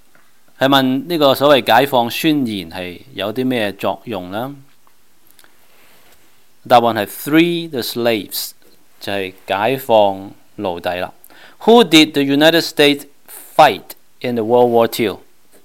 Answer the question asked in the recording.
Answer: 个答案系 Japan、Germany and Italy